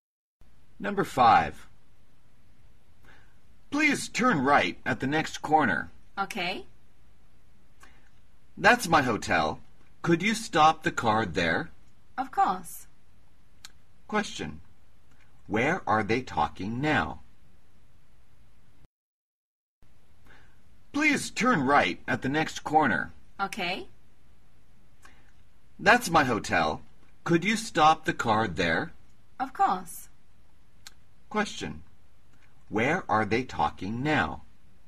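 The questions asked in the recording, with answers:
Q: Where are they talking now?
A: In a taxi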